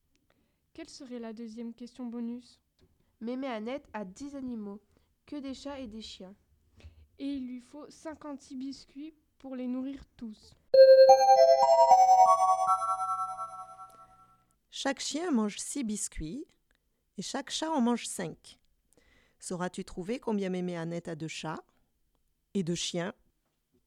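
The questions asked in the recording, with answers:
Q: Sauras-tu trouver combien Mémé Annette a de chats et de chiens ?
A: 4 chats et 6 chiens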